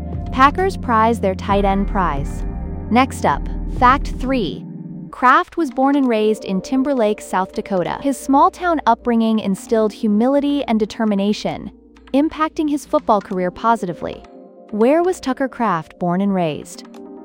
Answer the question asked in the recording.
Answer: Timberlake, South Dakota.